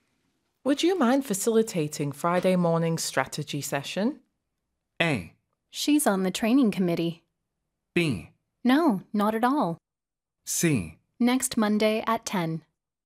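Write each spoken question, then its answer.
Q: Would you mind facilitating Friday morning strategy session?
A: B: No, not at all.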